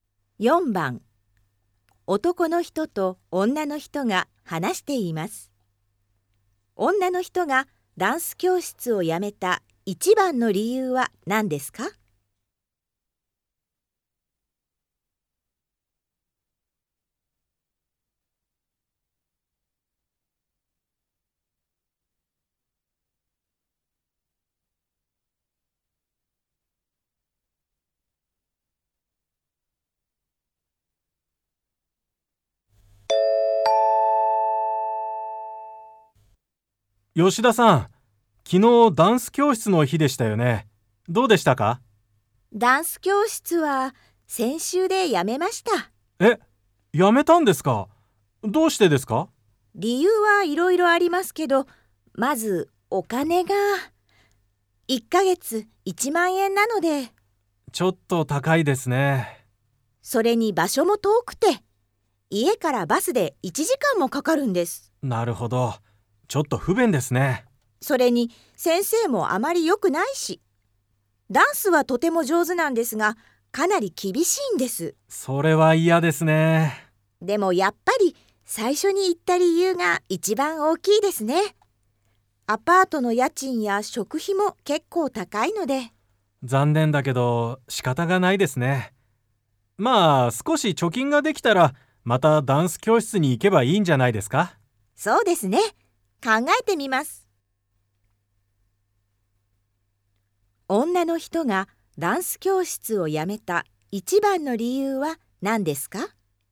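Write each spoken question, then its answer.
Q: 女の人がダンス教室を辞めた一番の理由は何ですか?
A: お金が高いから(1ヶ月1万円)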